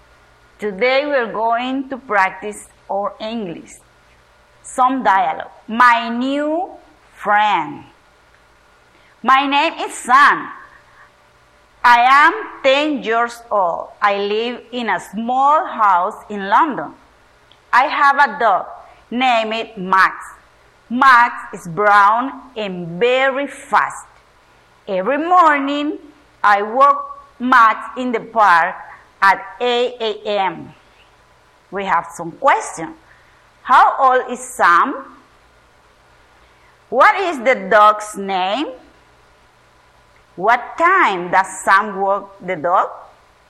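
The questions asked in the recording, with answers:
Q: How old is Sam?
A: 10 years old

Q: What is the dog's name?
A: Max

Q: What time does Sam walk the dog?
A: At 8 a.m.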